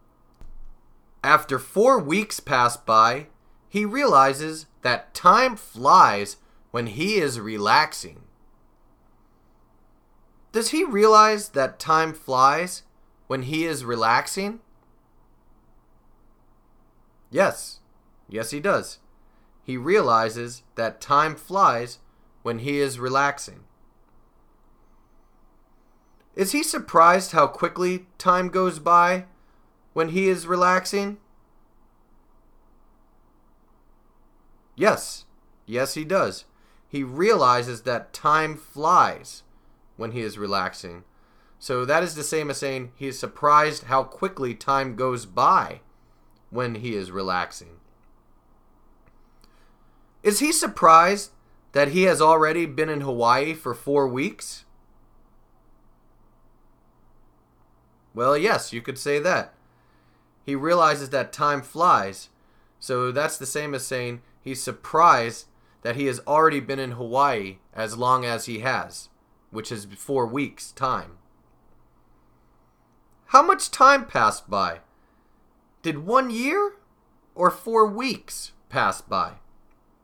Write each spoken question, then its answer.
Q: How much time passed by? Did 1 year or 4 weeks pass by?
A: 4 weeks passed by.